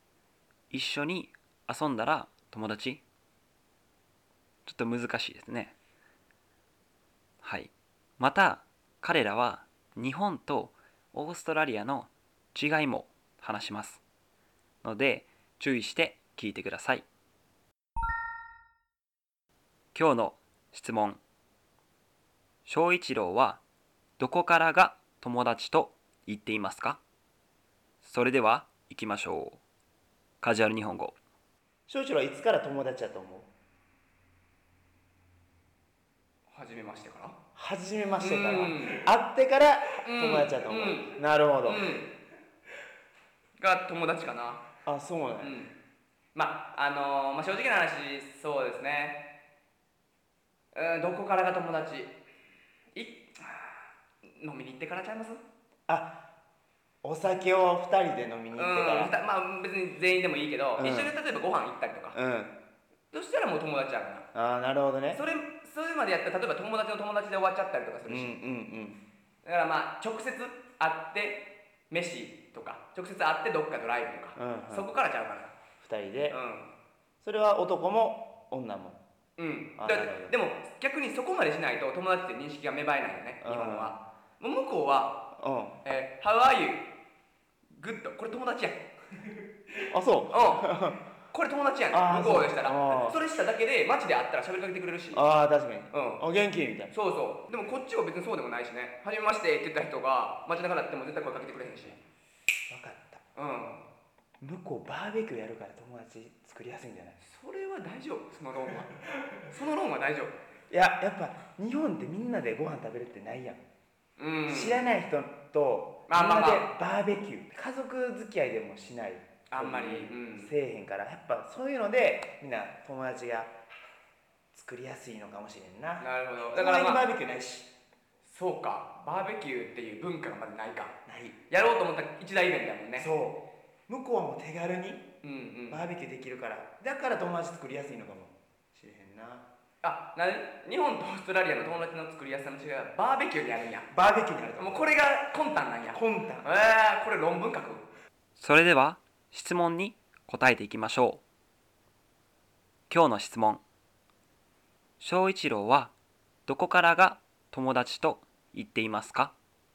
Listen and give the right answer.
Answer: お酒を一緒に飲んだら友達だと思っています。その他にもご飯を一緒に食べに行ったり、ドライブに行ったら友達だと思っています。